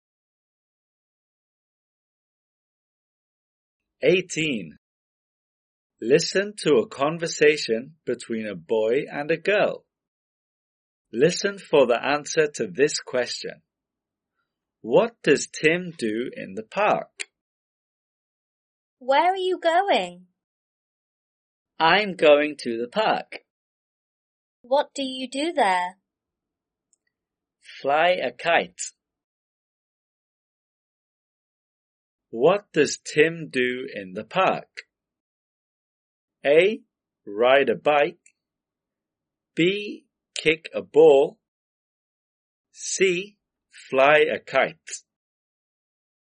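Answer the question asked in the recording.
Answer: C: Fly a kite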